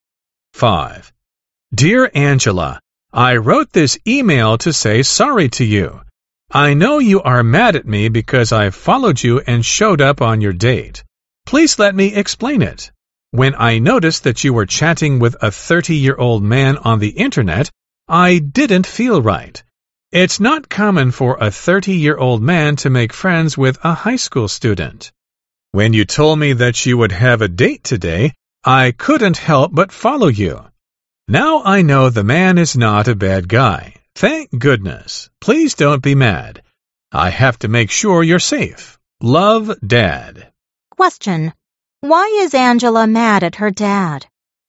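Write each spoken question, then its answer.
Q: Why is Angela mad at her dad?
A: He followed her and showed up on her date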